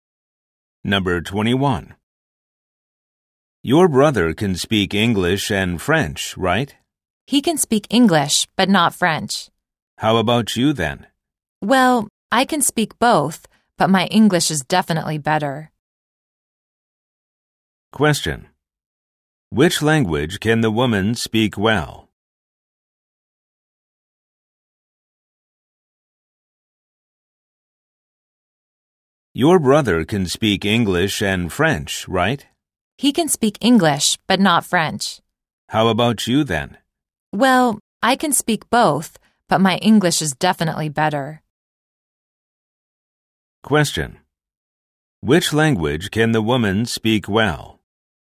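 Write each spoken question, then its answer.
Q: Which language can the woman speak well?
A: English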